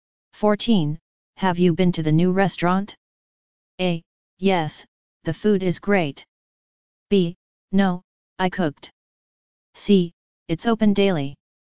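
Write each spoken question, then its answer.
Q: Have you been to the new restaurant?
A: A: Yes, the food is great.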